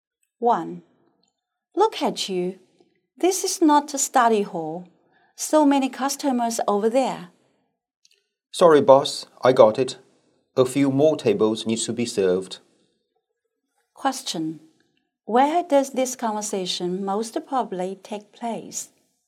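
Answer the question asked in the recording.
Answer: In a restaurant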